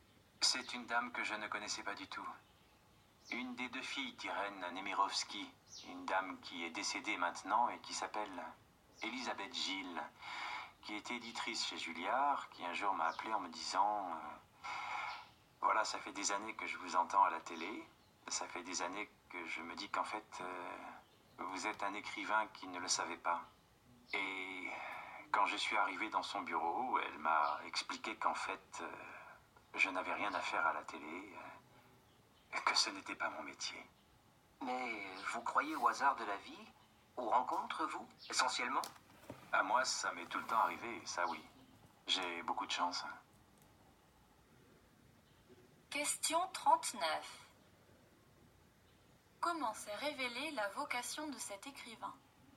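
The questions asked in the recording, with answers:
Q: Comment s'est révélée la vocation de cet écrivain ?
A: Grâce à une rencontre : une éditrice, Élisabeth Gilles, l'a appelé pour lui dire qu'il était un écrivain qui s'ignorait.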